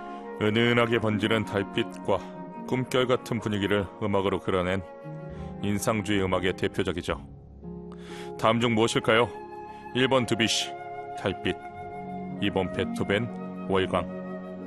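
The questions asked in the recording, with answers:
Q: 다음 중 무엇일까요?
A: 1: 드뷔시, 달빛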